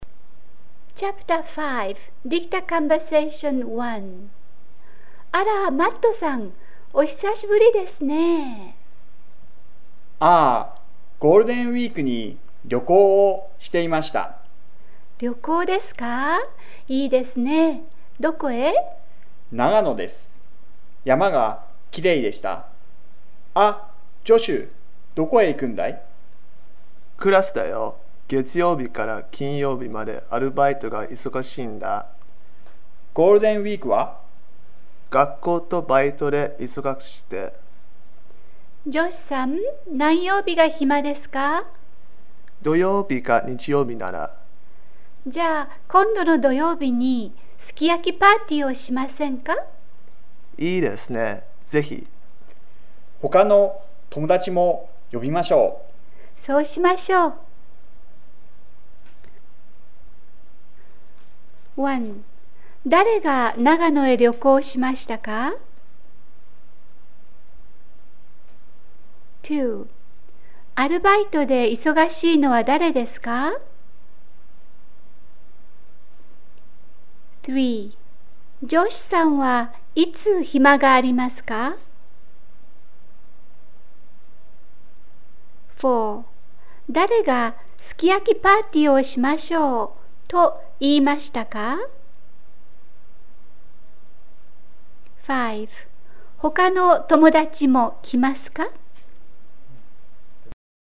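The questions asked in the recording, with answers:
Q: 誰が長野へ旅行しましたか?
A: マットさん

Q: アルバイトで忙しいのは誰ですか?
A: ジョシュさん

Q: ジョシュさんはいつ暇がありますか?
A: 土曜日か日曜日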